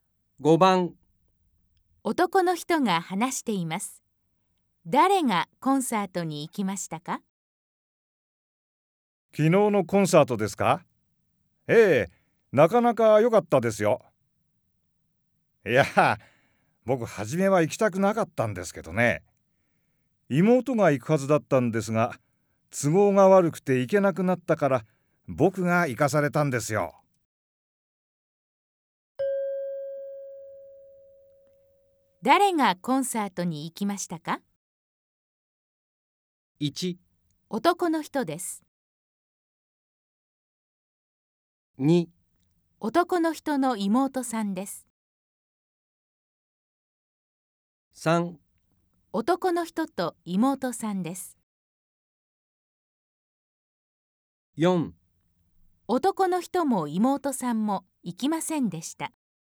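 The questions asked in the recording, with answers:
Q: 誰がコンサートに行きましたか?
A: 1: 男の人です。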